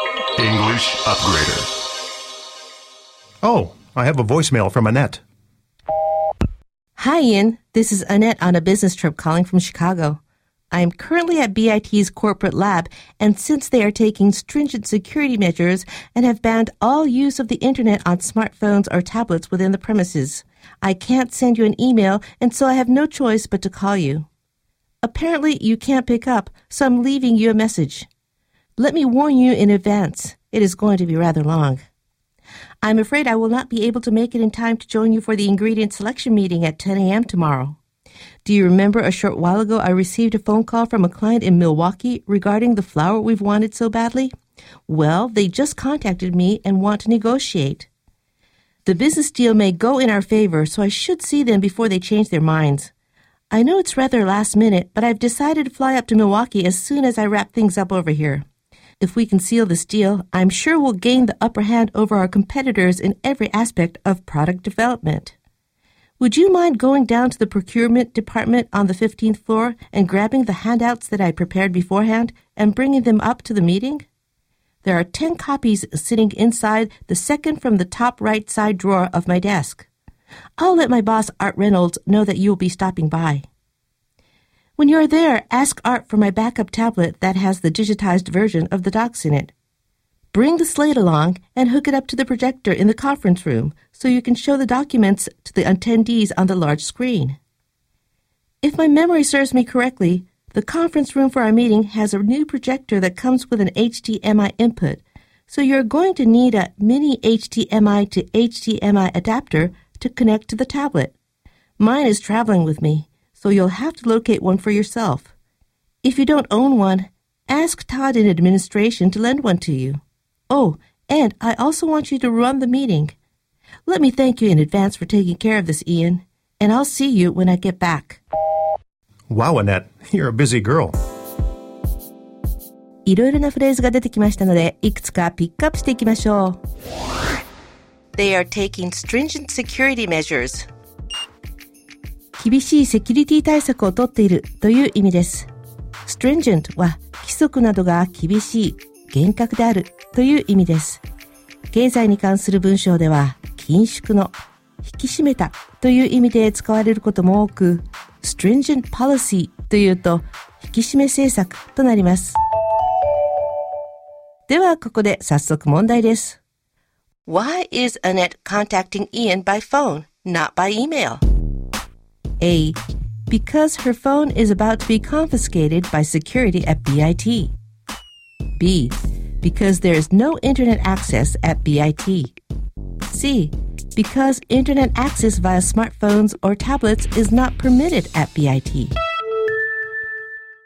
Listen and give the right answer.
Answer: 正解は C。BIT 社内ではスマートフォンやタブレットでのインターネットアクセスが許可されていないからです。